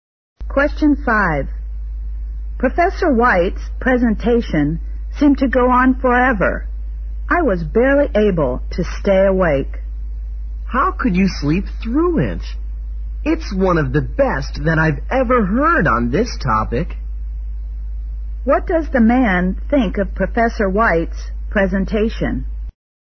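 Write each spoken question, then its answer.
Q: What does the man think of Professor White's presentation?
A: It was one of the best he has heard on the topic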